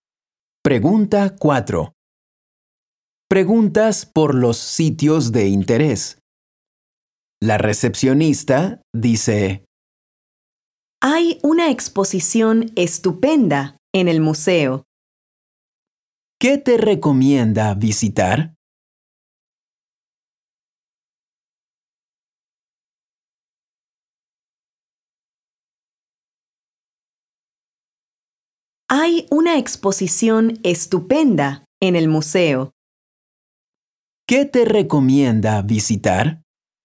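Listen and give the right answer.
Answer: el museo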